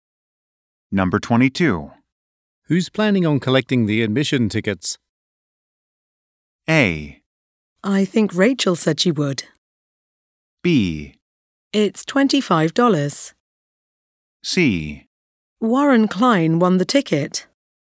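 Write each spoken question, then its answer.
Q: Who's planning on collecting the admission tickets?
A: A: I think Rachel said she would.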